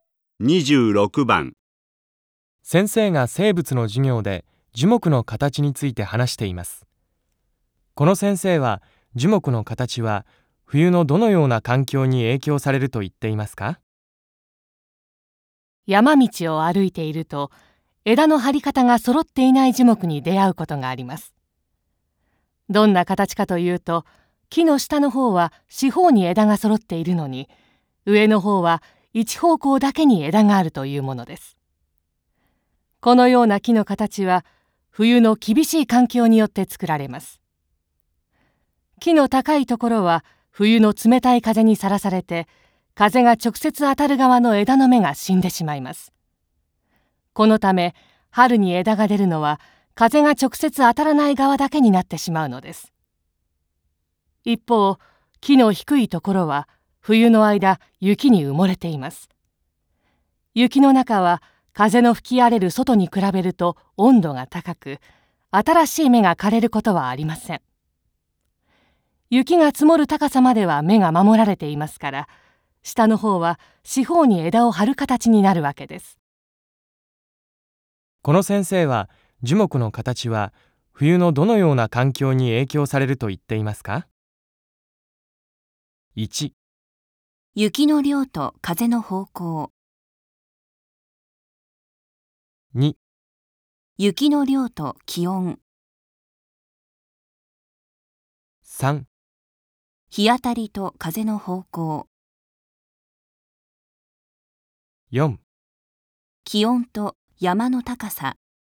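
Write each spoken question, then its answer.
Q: この先生は樹木の形は冬のどのような環境に影響されると言っていますか?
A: 1: 雪の量と風の方向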